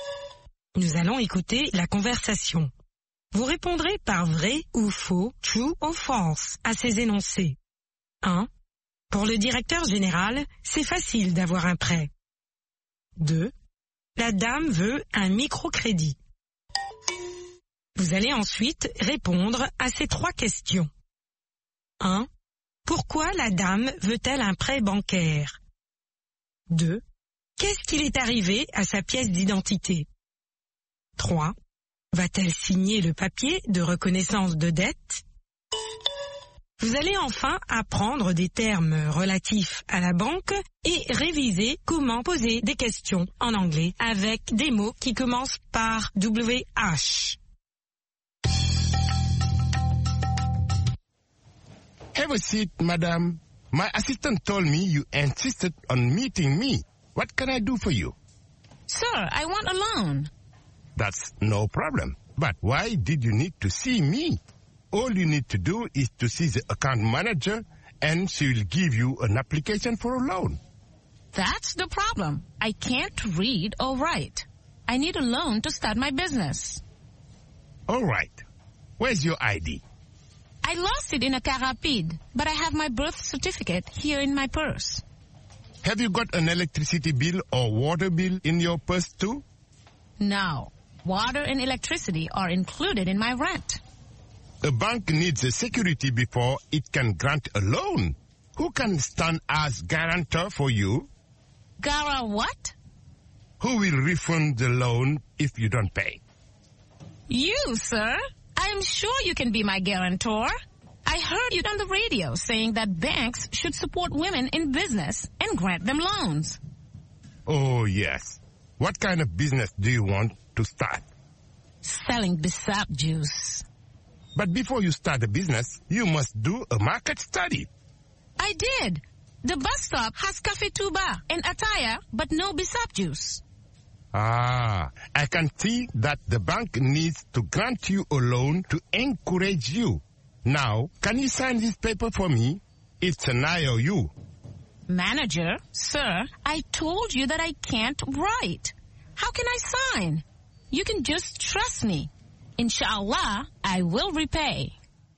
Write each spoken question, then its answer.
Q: Pour le directeur général, c'est facile d'avoir un prêt.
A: L'énoncé 1 est vrai. Pour le directeur général, c'est facile d'avoir un prêt.

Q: La dame veut un microcrédit.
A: L'énoncé 2 est faux. La dame veut un microcrédit.

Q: Pourquoi la dame veut-elle un prêt bancaire?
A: Pour commencer son propre commerce.

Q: Qu'est-ce qu'il est arrivé à sa pièce d'identité?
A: Elle l'a perdue.

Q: Va-t-elle signer le papier de reconnaissance de dette?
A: Non.